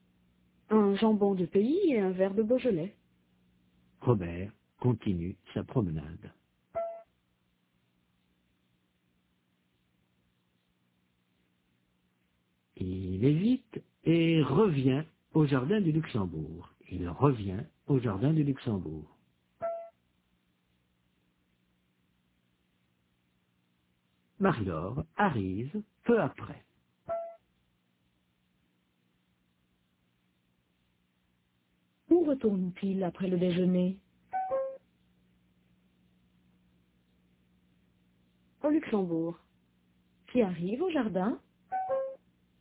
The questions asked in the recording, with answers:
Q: Où retourne-t-il après le déjeuner?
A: Au Luxembourg.

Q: Qui arrive au jardin?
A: Marie-Laure.